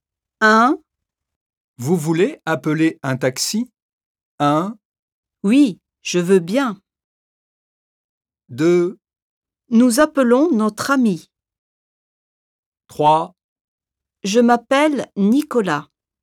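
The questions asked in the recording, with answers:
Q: Vous voulez appeler un taxi ?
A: 1: Oui, je veux bien.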